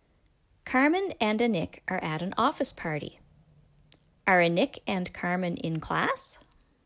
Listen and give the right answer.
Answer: No, they aren't in class.